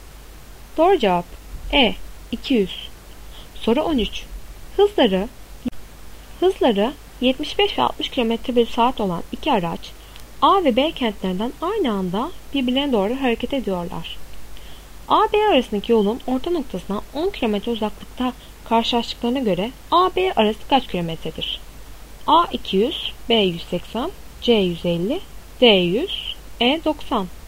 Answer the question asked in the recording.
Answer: Doğru cevap B 180.